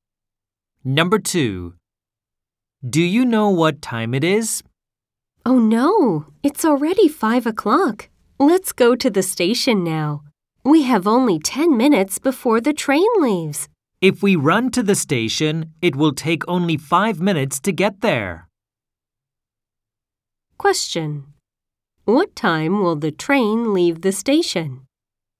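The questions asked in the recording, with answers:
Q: What time will the train leave the station?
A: At 5:10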